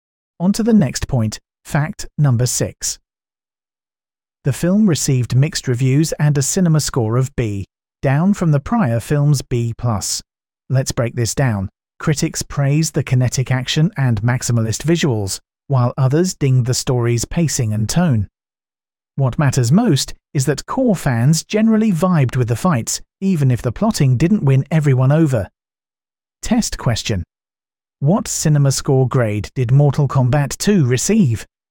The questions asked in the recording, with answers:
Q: What cinema score grade did Mortal Kombat 2 receive?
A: Correct answer. B.